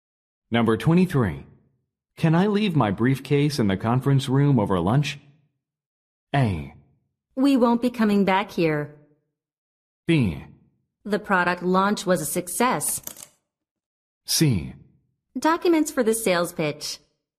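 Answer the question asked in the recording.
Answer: A: We won't be coming back here.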